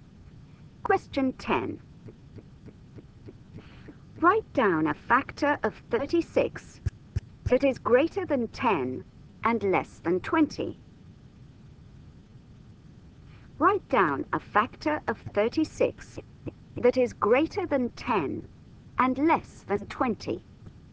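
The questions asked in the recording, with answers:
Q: Write down a factor of 36 that is greater than 10 and less than 20.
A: 12 or 18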